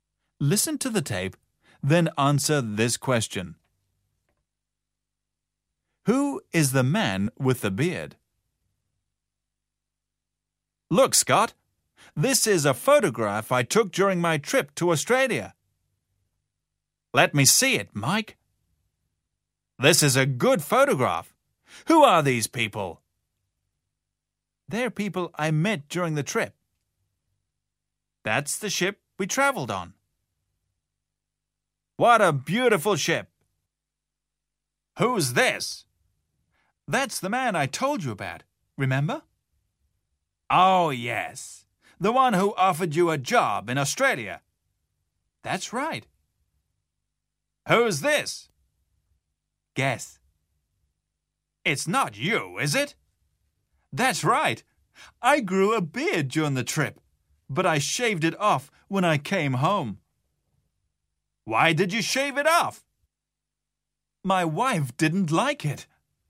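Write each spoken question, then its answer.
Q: Who is the man with the beard?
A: Mike (the speaker himself)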